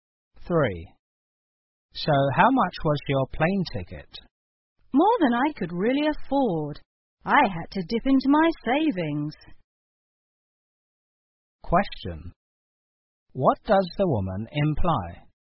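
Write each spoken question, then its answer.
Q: What does the woman imply?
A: The ticket was very expensive, so she had to use her savings.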